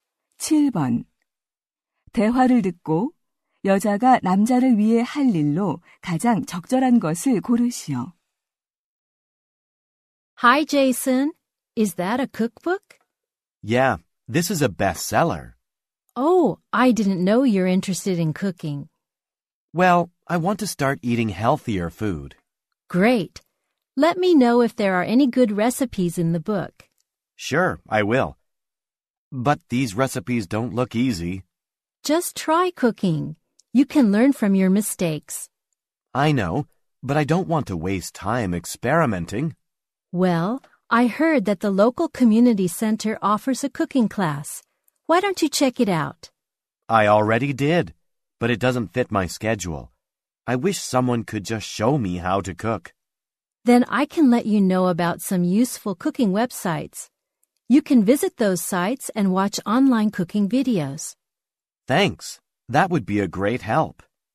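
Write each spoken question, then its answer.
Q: 대화를 듣고 여자가 남자를 위해 할 일로 가장 적절한 것을 고르시오.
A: 유용한 요리 웹사이트 알려 주기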